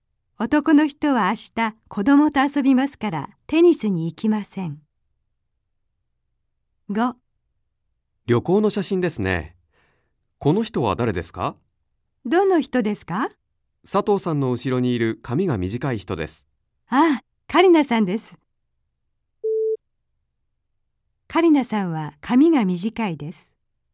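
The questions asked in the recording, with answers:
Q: カリナさんは髪が短いです。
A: ○(正しい)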